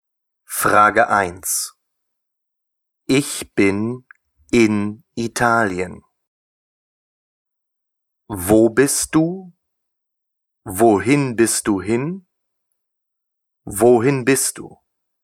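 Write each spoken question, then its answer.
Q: Ich bin in Italien.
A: Wo bist du?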